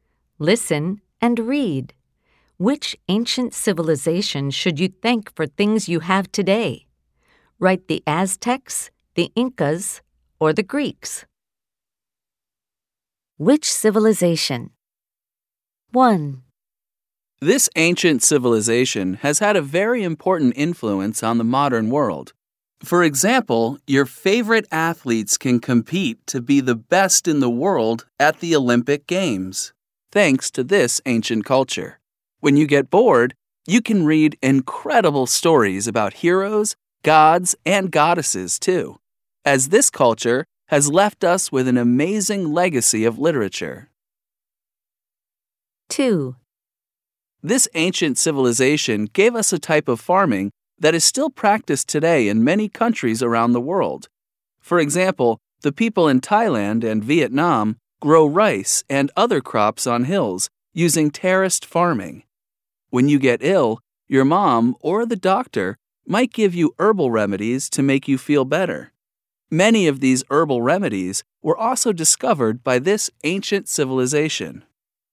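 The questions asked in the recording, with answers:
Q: Which civilization? 1.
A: the Greeks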